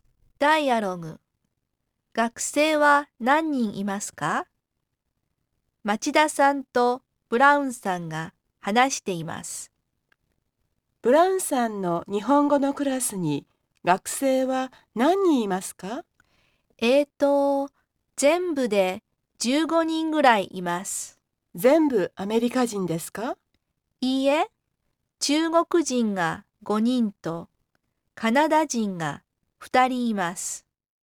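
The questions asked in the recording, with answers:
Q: 学生は何人いますか?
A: 全部で15人ぐらい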